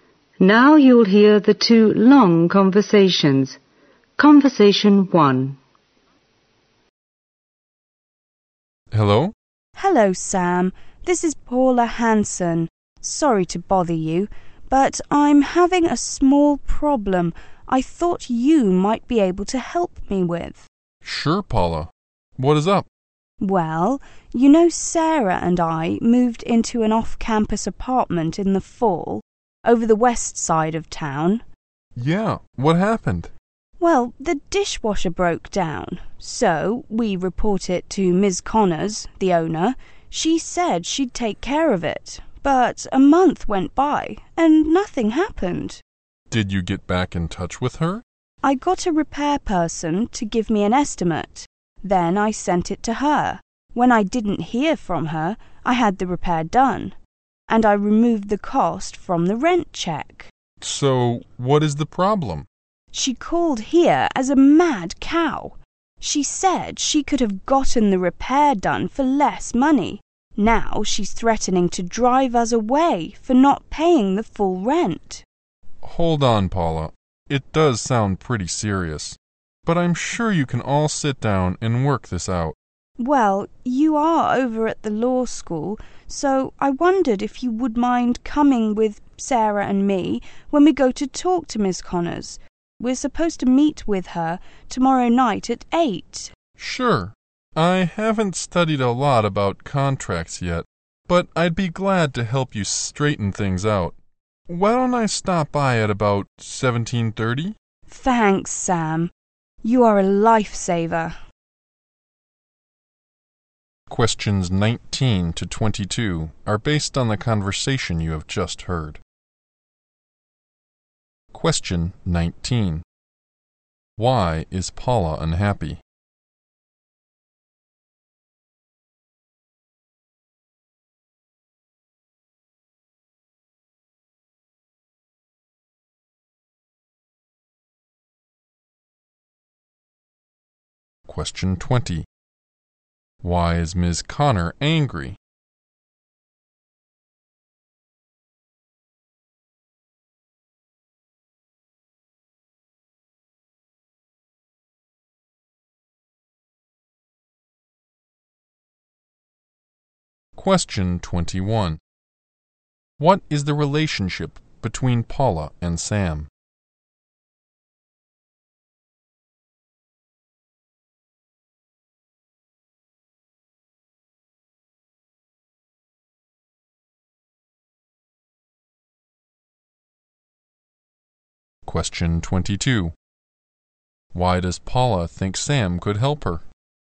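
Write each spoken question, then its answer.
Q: Why is Paula unhappy?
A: The owner is threatening to drive them out over the rent she cut for the dishwasher repair

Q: Why is Ms. Connor angry?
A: Paula took the repair cost out of the rent, and she could have had it repaired for less

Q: Why does Paula think Sam could help her?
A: He studies at the law school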